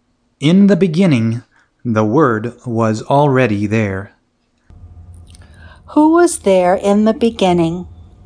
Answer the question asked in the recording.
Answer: The Word was there in the beginning.